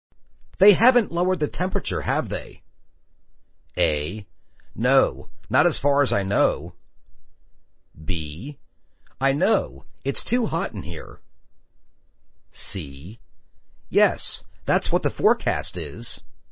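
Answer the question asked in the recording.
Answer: A: No, not as far as I know.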